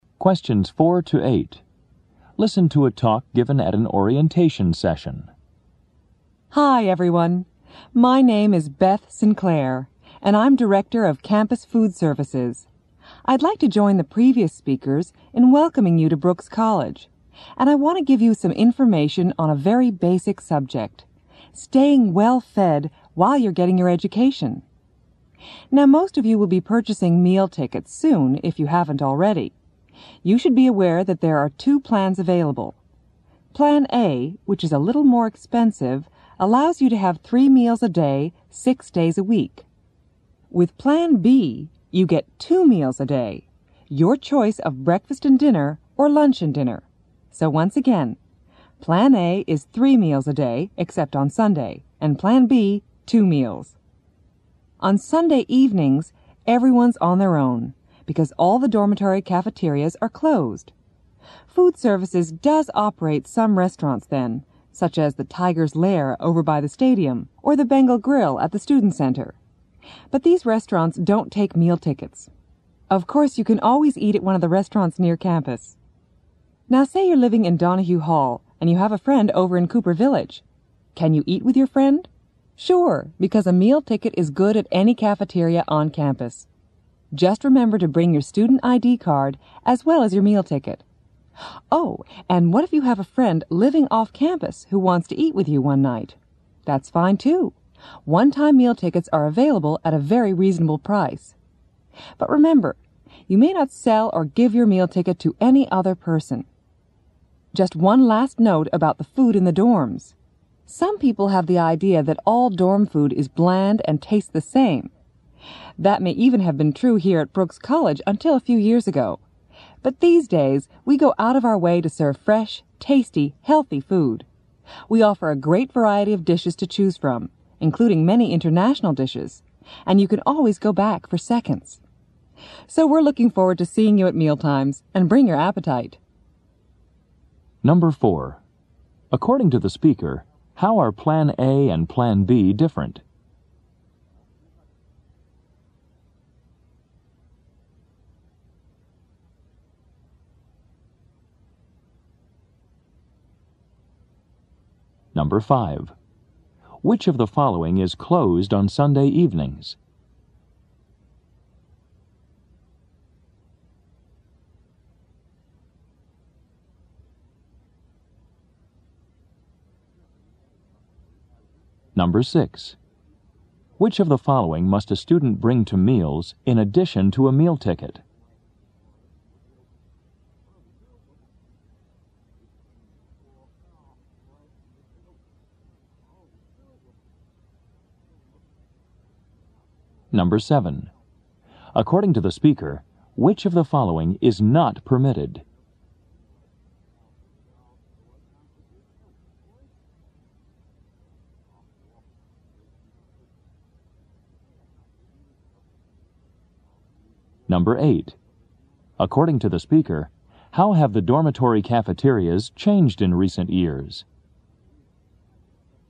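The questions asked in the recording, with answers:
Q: According to the speaker, how are Plan A and Plan B different?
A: Plan A gives 3 meals a day; Plan B gives 2 meals a day

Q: Which of the following is closed on Sunday evenings?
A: The dormitory cafeterias

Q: Which of the following must a student bring to meals in addition to a meal ticket?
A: Student ID card

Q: According to the speaker, which of the following is not permitted?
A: Selling or giving your meal ticket to another person

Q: According to the speaker, how have the dormitory cafeterias changed in recent years?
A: They now serve fresh, tasty, healthy food with a great variety of dishes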